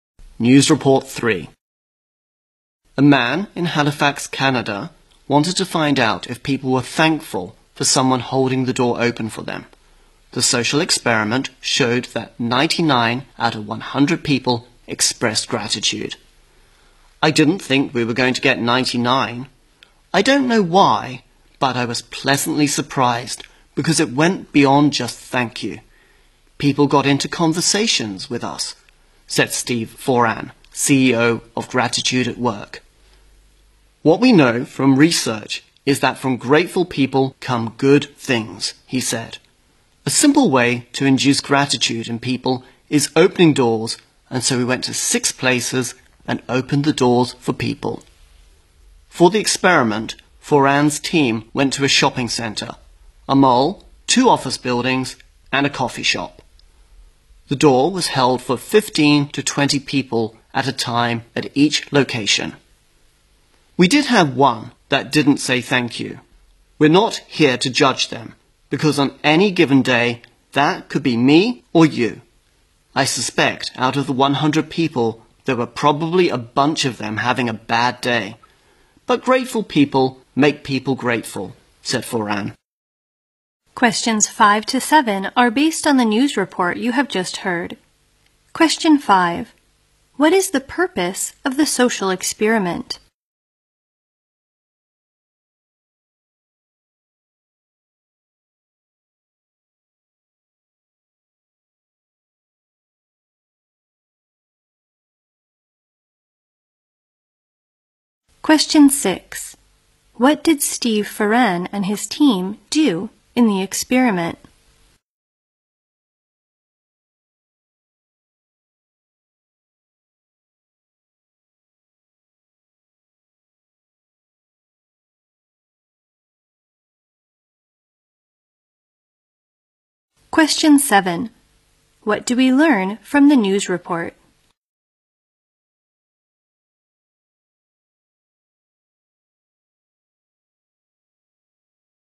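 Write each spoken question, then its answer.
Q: What is the purpose of the social experiment?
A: To find out if people are thankful when someone holds the door open for them

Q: What did Steve Foran and his team do in the experiment?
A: They held doors open for people at 6 places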